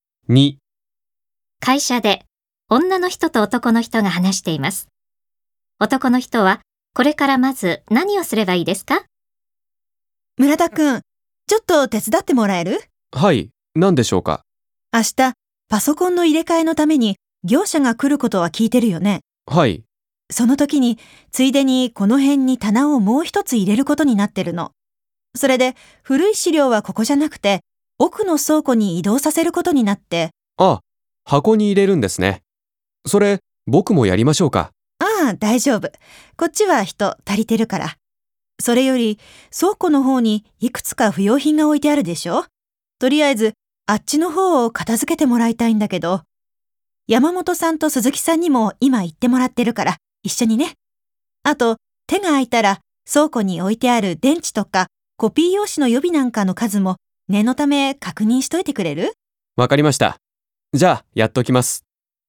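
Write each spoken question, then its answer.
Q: 男の人はこれからまず何をすればいいですか?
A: 倉庫の不要品を片付ける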